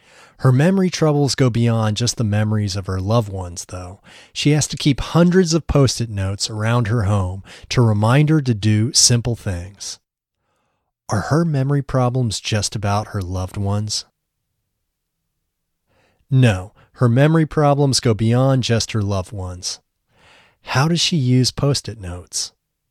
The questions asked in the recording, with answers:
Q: How does she use post-it notes?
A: She keeps hundreds of post-it notes around her home to remind her to do simple things.